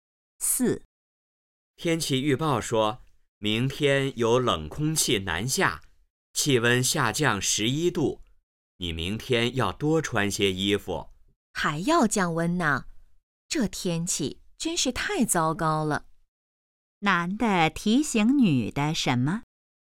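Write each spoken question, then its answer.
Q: 男的提醒女的什么?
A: 明天多穿些衣服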